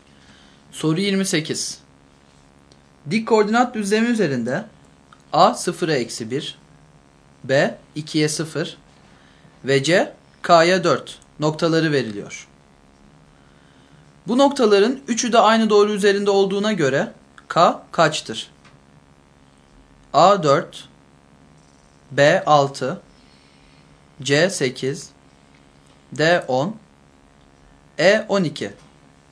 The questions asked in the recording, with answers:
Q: Bu noktaların 3'ü de aynı doğru üzerinde olduğuna göre K kaçtır?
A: Doğru yanıt D şıkkı.